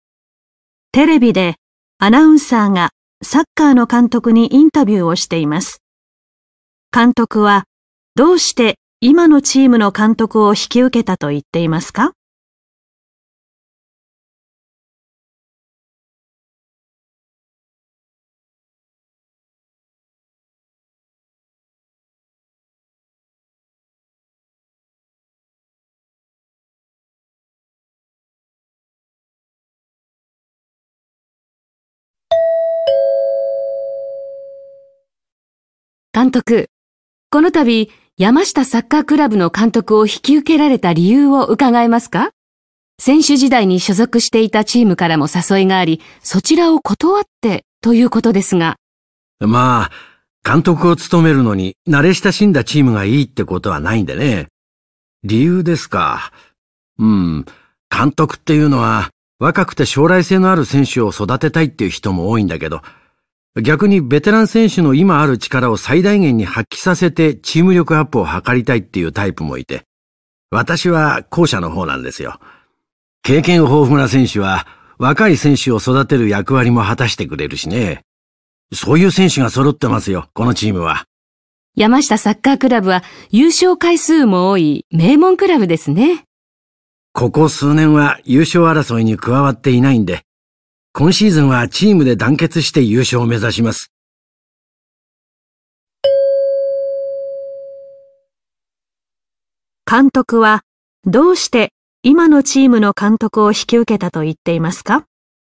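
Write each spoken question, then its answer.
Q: 監督はどうして今のチームの監督を引き受けたと言っていますか?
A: 経験豊富なベテラン選手が揃っていて、その力を最大限に発揮させたいから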